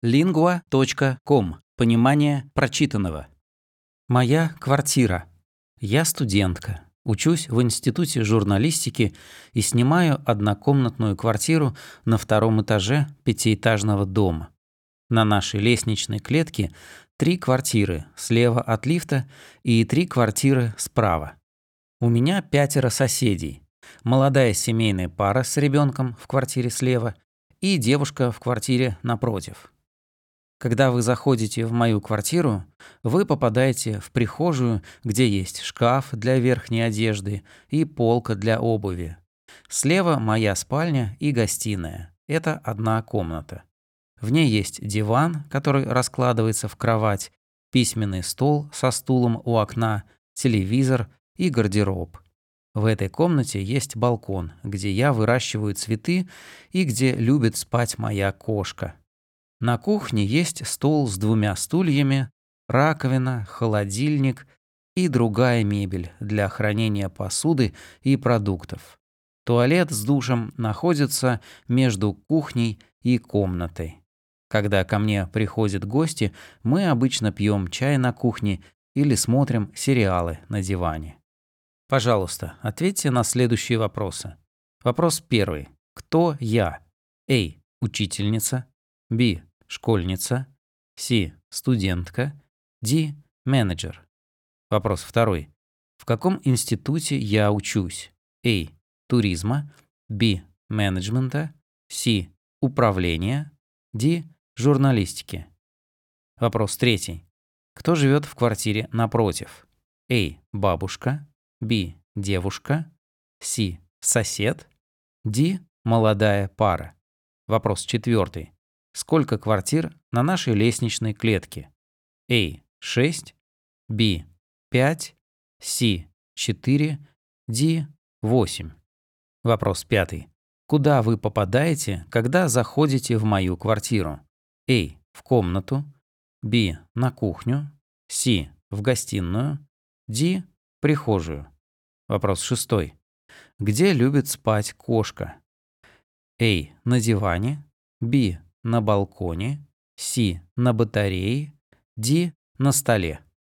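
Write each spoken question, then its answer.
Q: Кто я?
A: C: Студентка

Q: В каком институте я учусь?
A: D: Журналистики

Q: Кто живет в квартире напротив?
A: B: Девушка

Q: Сколько квартир на нашей лестничной клетке?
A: A: 6

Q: Куда вы попадаете, когда заходите в мою квартиру?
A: D: Прихожую

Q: Где любит спать кошка?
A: B: На балконе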